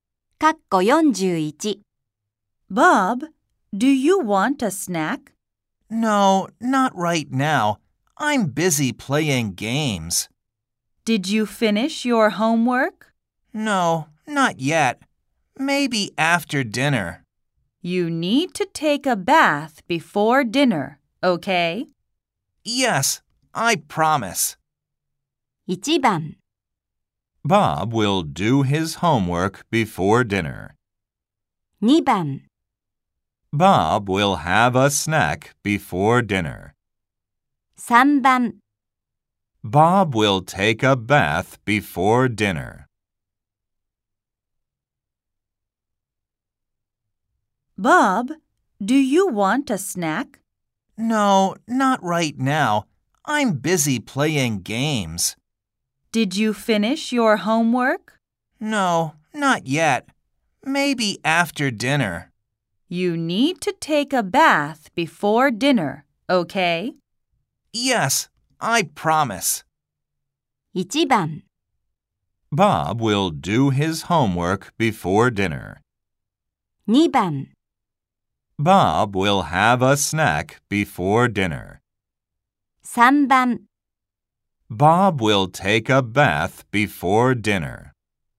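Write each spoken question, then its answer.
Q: Bob will take a bath before dinner.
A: 3: Bob will take a bath before dinner.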